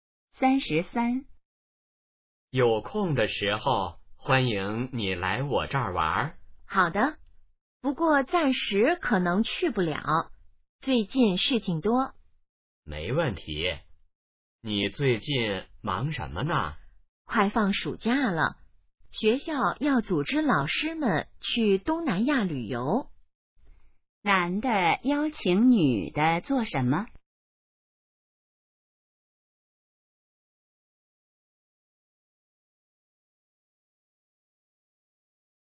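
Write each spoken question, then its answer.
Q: 男的邀请女的做什么?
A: 来他那儿玩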